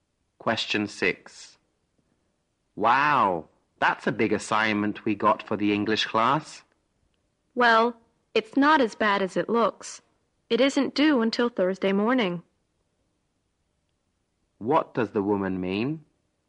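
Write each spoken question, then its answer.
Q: What does the woman mean?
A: The assignment isn't as hard as it looks, and they have until Thursday morning.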